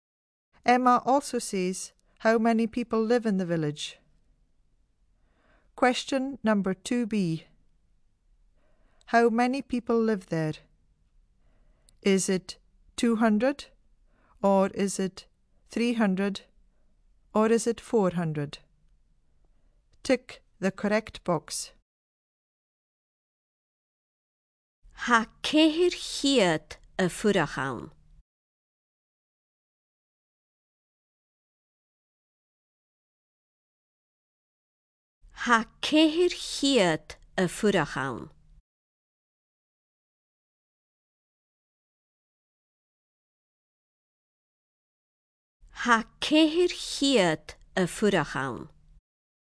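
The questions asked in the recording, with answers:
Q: How many people live there?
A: C: 400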